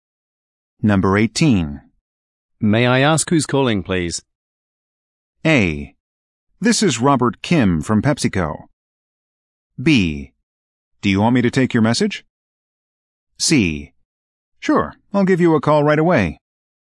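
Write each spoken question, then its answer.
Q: May I ask who's calling, please?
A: A: This is Robert Kim from PepsiCo.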